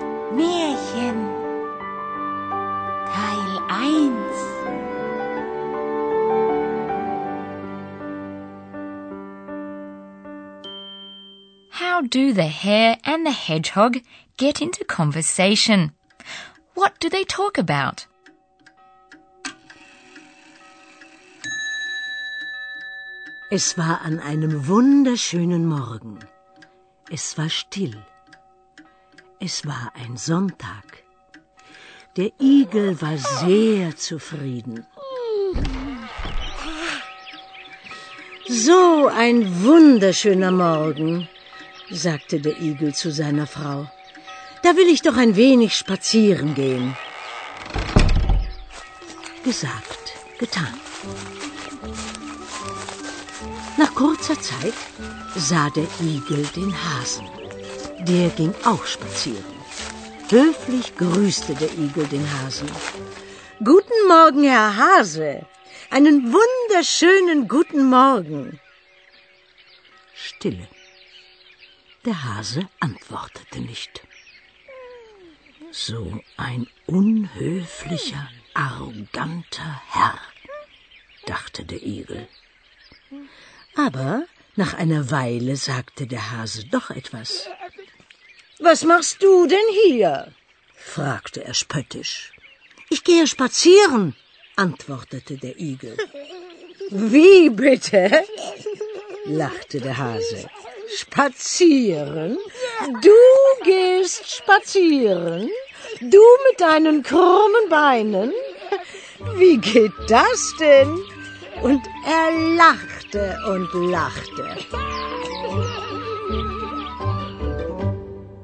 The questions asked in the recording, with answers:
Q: How do the hare and the hedgehog get into conversation?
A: The hare, probably the hedgehog's neighbor, had the same idea.

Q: What do they talk about?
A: Going for a walk. Spazieren gehen.